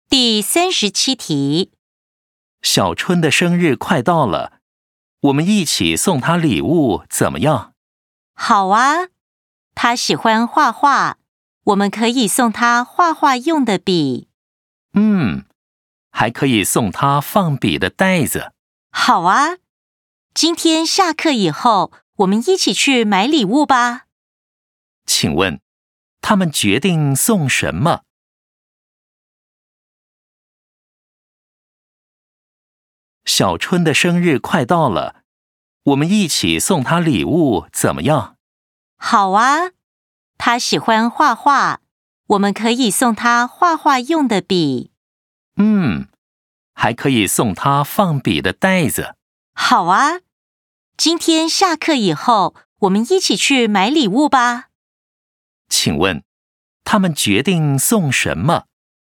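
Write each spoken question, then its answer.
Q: 请问,他们决定送什么?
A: 画画用的笔和放笔的袋子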